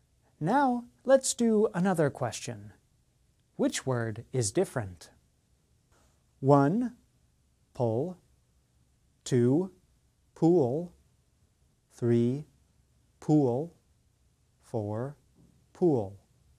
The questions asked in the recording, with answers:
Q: Which word is different?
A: The answer is one, pull.